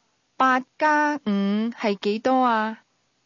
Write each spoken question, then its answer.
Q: 八加五是几多啊?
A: 十三。十三。